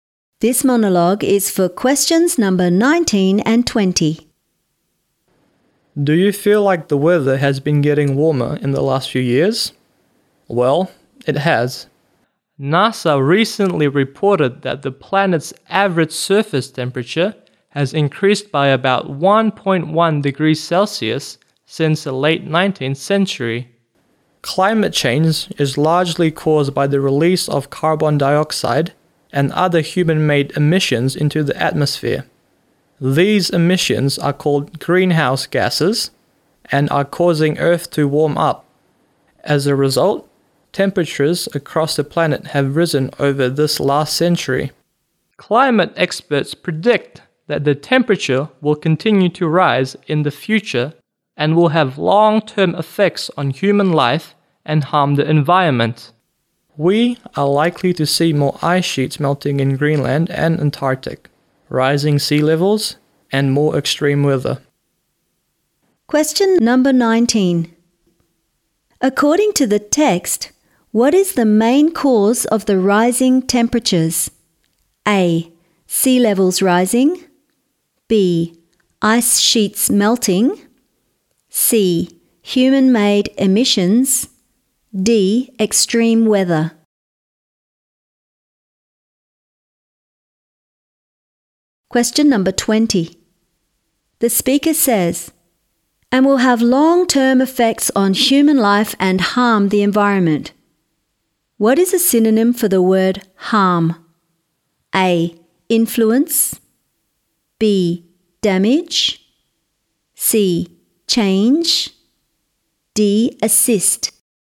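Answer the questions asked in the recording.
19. C: Human-made emissions.
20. B: Damage.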